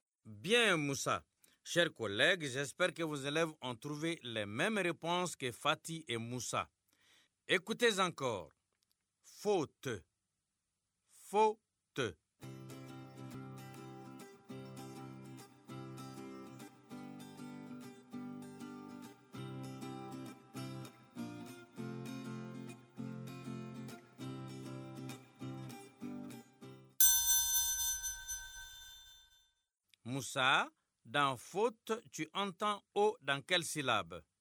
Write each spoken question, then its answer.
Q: Moussa, dans faute, tu entends O dans quelle syllabe?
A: Monsieur, dans faux, la première syllabe.